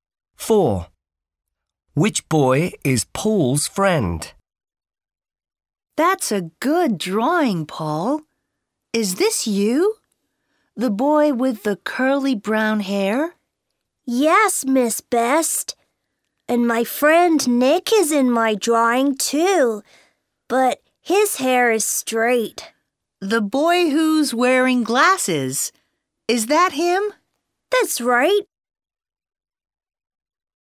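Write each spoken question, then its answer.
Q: Which boy is Paul's friend?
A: The boy with straight hair who's wearing glasses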